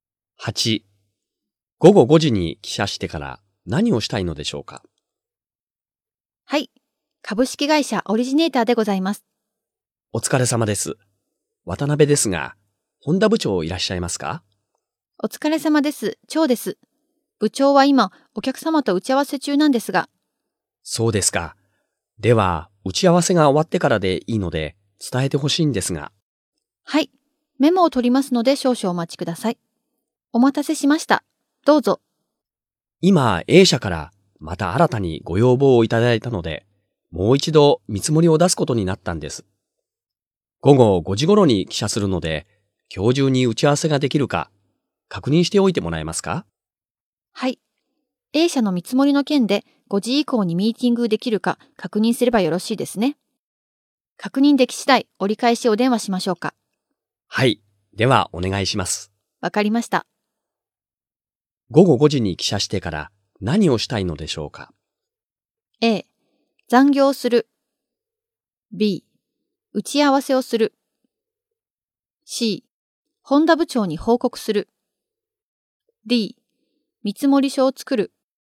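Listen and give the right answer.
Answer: B: 打ち合わせをする。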